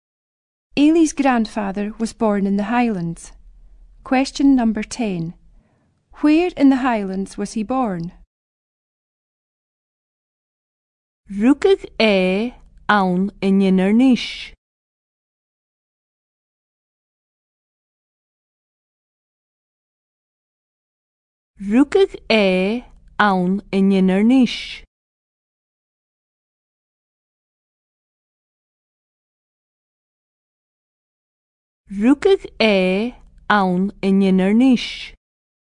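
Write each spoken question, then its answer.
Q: Where in the Highlands was he born?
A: Inverness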